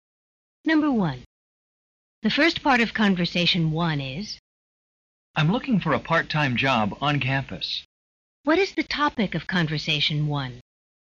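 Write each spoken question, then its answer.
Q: What is the topic of conversation one?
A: Finding a part-time job on campus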